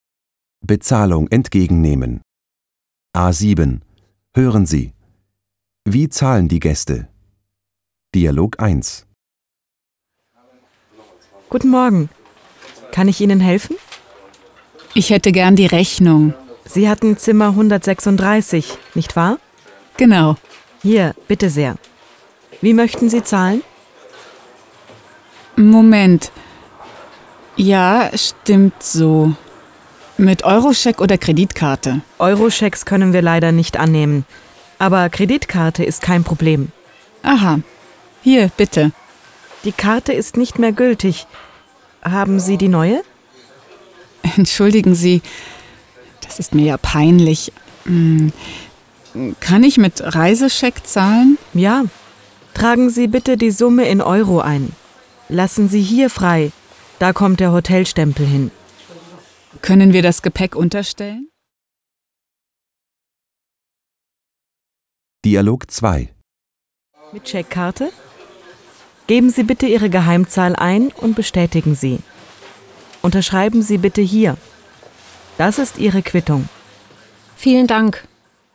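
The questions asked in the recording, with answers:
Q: Wie zahlen die Gäste?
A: Dialog 1: mit Reisescheck; Dialog 2: mit Checkkarte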